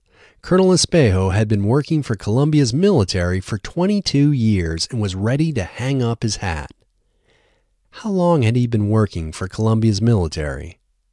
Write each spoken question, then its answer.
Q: How long had he been working for Colombia's military?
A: He had been working for Colombia's military for 22 years.